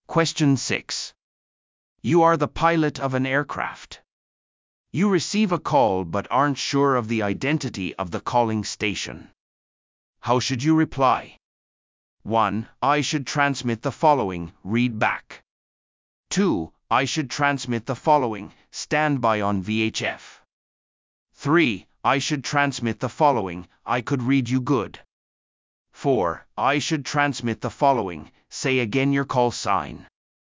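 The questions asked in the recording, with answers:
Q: How should you reply?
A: 4: I should transmit the following, say again your call sign.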